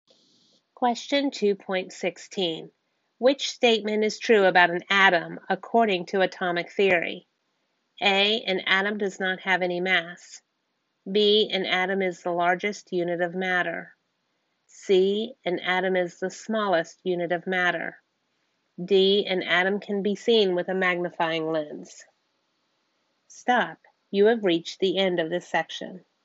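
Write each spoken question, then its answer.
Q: Which statement is true about an atom according to atomic theory?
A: C: An atom is the smallest unit of matter.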